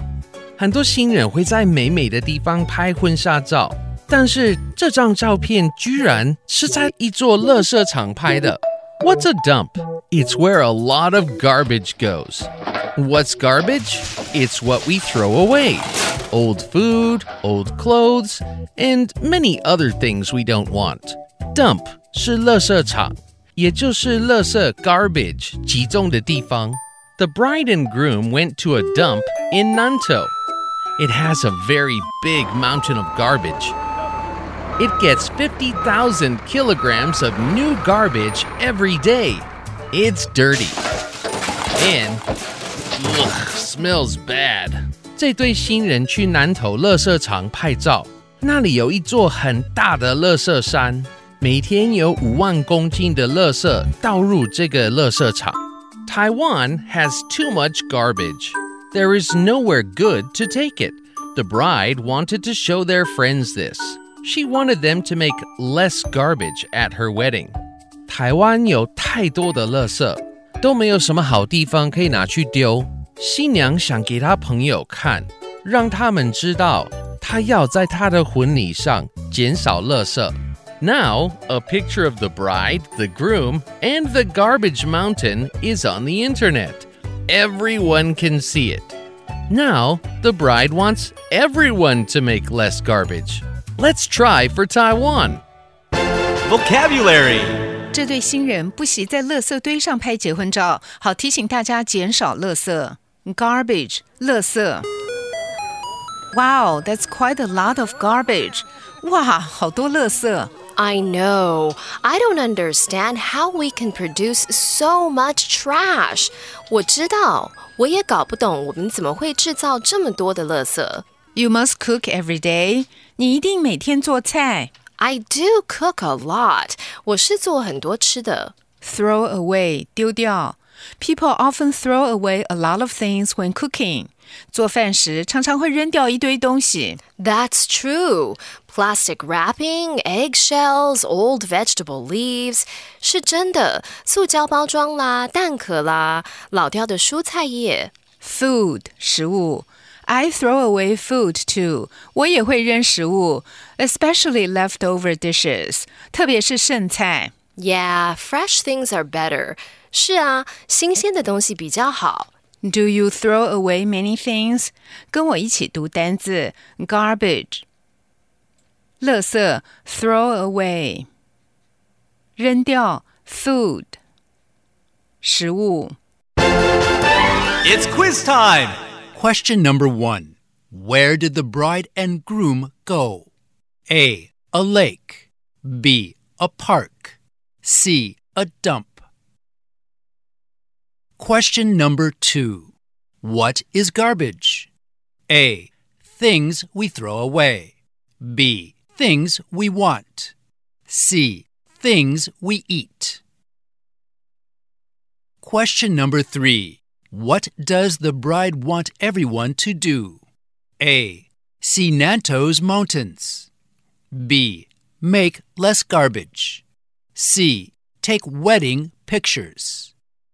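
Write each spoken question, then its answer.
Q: Where did the bride and groom go?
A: C: A dump.

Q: What is garbage?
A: A: Things we throw away.

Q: What does the bride want everyone to do?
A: B: Make less garbage.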